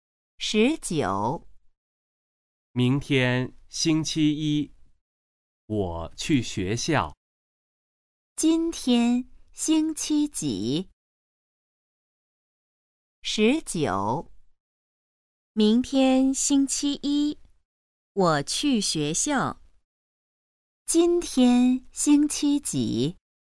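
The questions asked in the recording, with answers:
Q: 今天星期几?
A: 星期日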